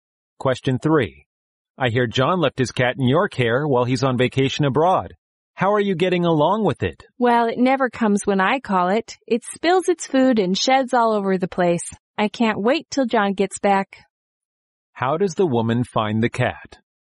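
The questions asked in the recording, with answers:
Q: How does the woman find the cat?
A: Troublesome and annoying to look after.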